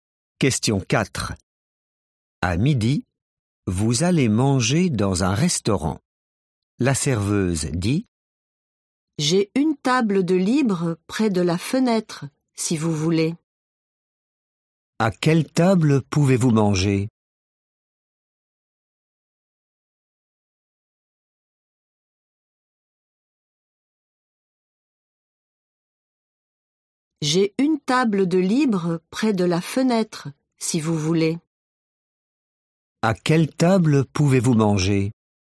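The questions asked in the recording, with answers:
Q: À quelle table pouvez-vous manger ?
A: une table près de la fenêtre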